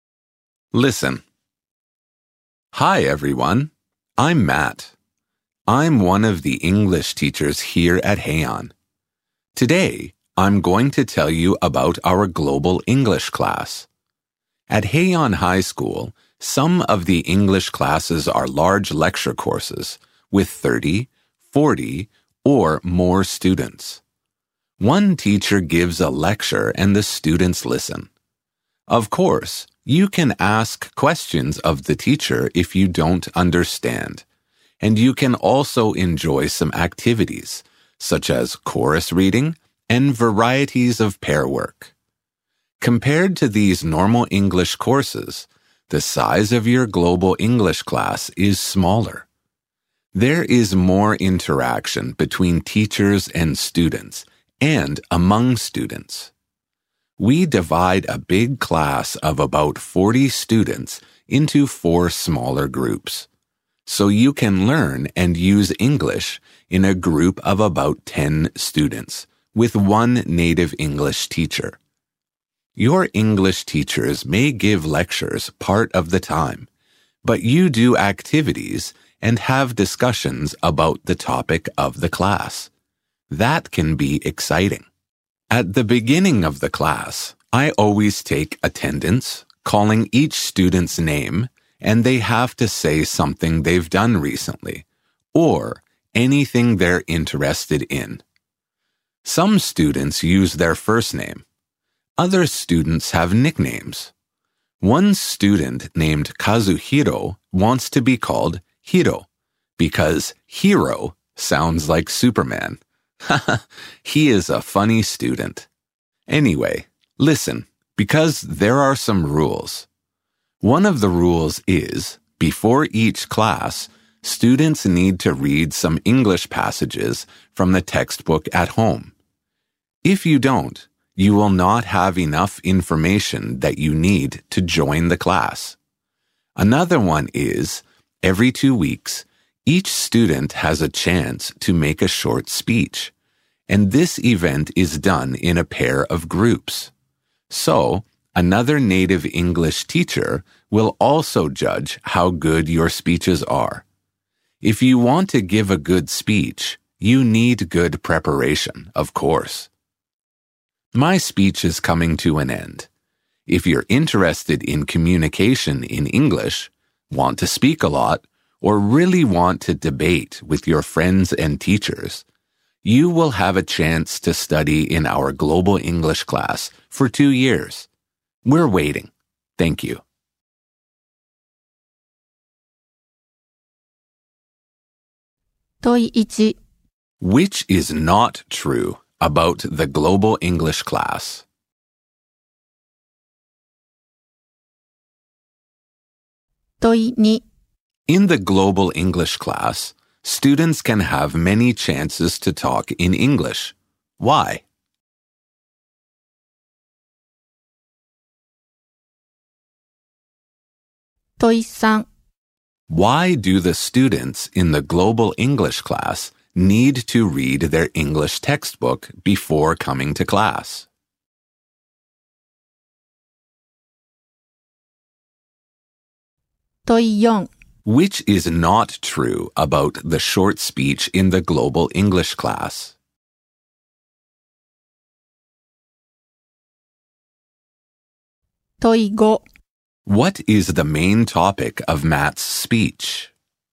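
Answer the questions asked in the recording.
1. Because the class is divided into small groups of about 10 students with a native English teacher
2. To have enough information to join the class
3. The global English class at Heian High School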